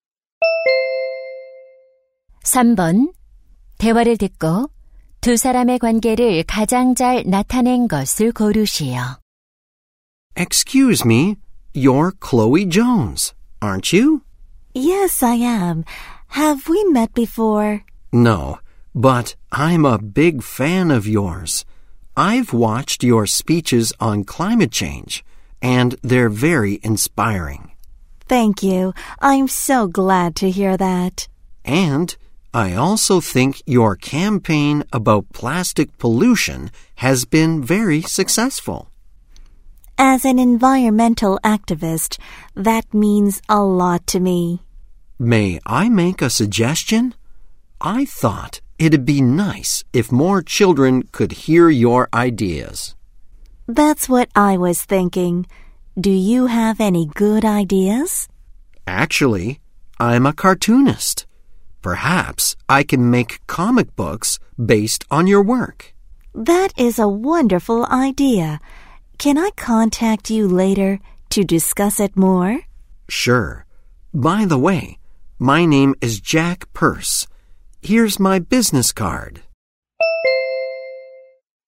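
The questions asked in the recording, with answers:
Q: 대화를 듣고 두 사람의 관계를 가장 잘 나타낸 것을 고르시오.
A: 환경 운동가 - 만화가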